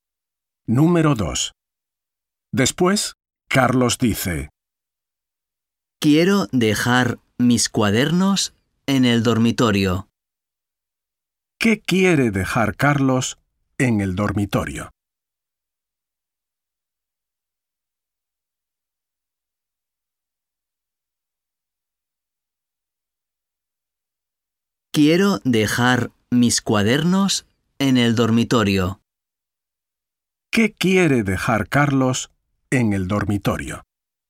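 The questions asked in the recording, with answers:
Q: ¿Qué quiere dejar Carlos en el dormitorio?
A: sus cuadernos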